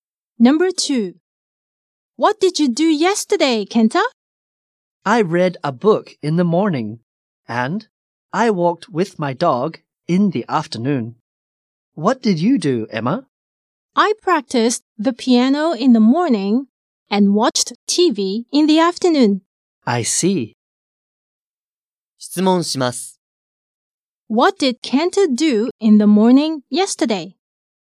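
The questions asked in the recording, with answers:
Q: What did Kenta do in the morning yesterday?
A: He read a book.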